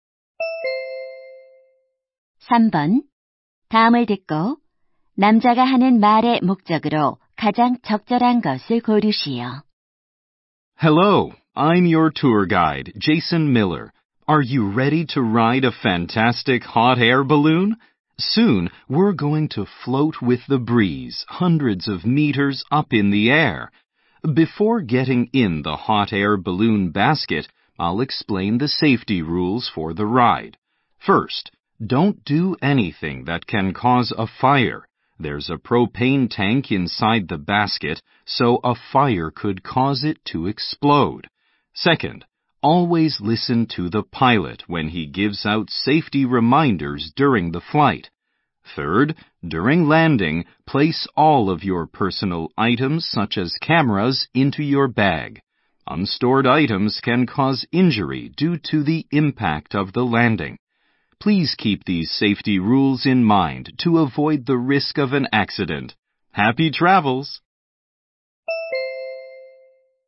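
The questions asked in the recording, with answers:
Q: 다음을 듣고 남자가 하는 말의 목적으로 가장 적절한 것을 고르시오.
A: 열기구 탑승 안전 수칙을 설명하려고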